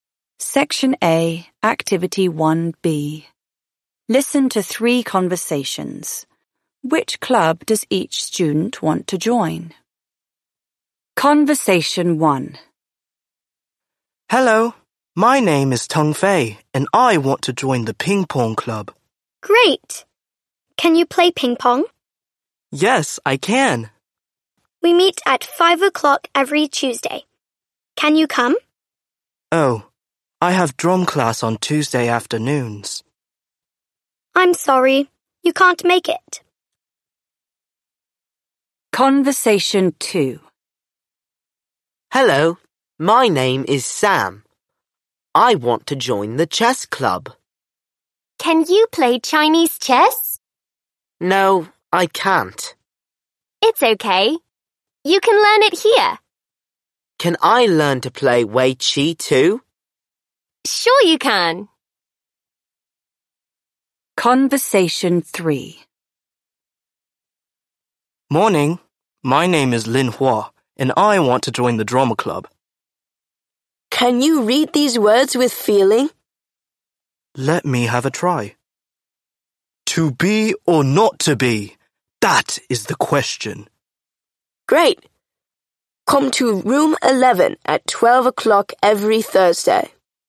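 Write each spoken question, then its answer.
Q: Which club does each student want to join?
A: Tung Fei: ping pong club; Sam: chess club; Lin Hua: drama club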